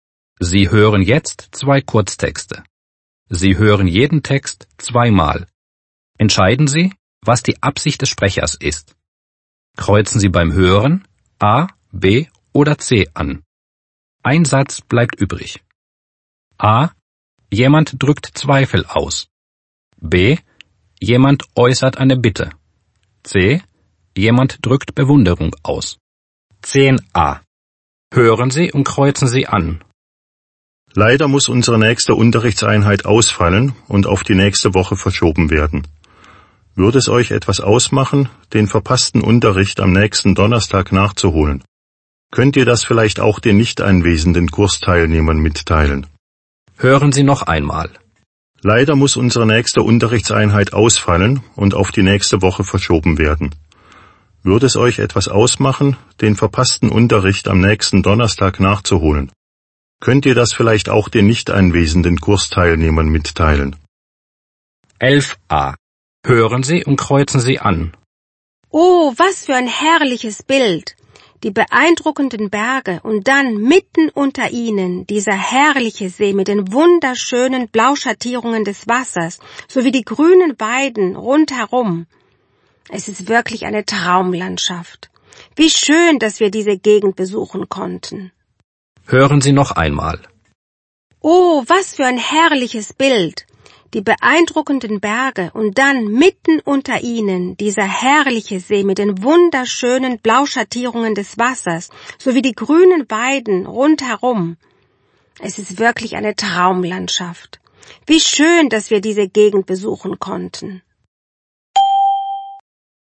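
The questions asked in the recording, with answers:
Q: Entscheiden Sie, was die Absicht des Sprechers ist.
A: B: Jemand äußert eine Bitte.

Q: Entscheiden Sie, was die Absicht des Sprechers ist.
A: C: Jemand drückt Bewunderung aus.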